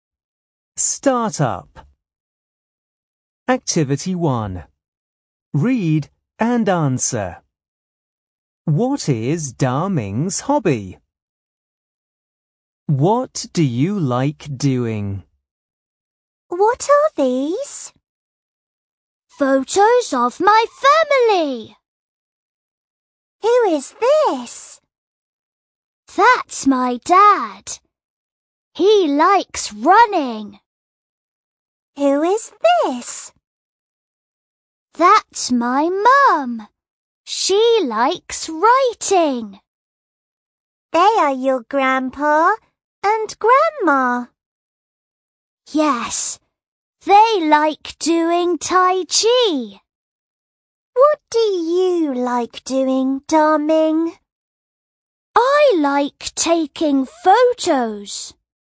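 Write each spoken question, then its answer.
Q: What is Da Ming's hobby?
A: Taking photos.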